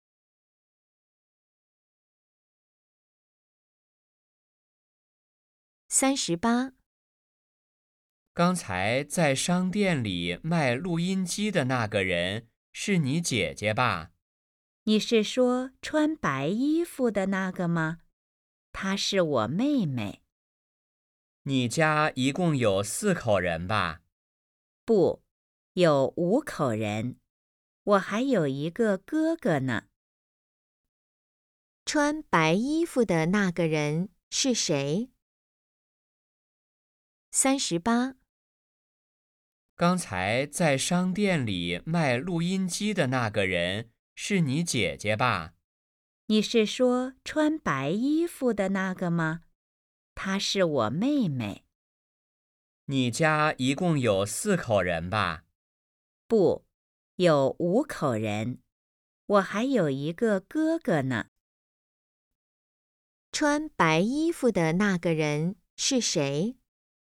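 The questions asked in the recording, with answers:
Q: 穿白衣服的那个人是谁?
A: 妹妹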